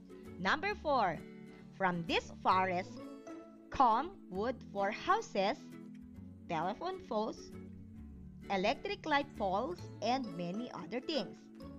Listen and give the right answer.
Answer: Exactly, it is a fact.